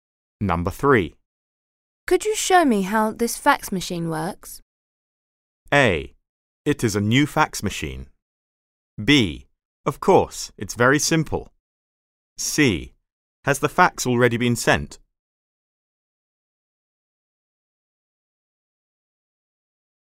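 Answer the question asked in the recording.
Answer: B: Of course, it's very simple.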